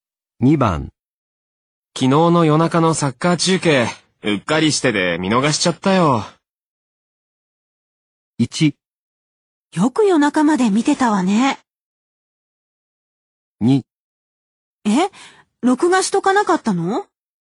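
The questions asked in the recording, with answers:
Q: 昨日の夜中のサッカー中継、うっかりしてで見逃しちゃったよ。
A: 2: え録画しとかなかったの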